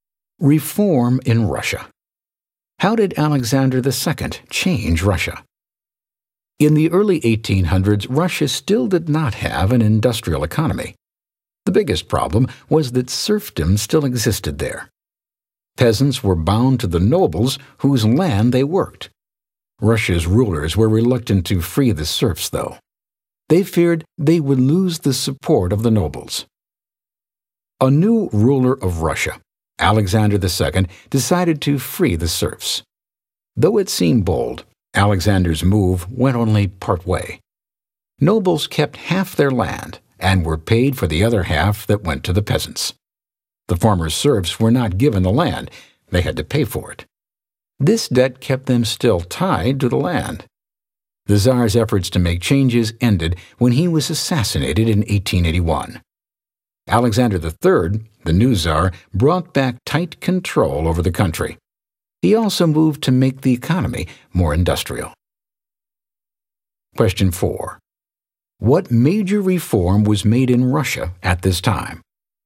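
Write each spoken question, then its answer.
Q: What major reform was made in Russia at this time?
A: Alexander II freed the serfs.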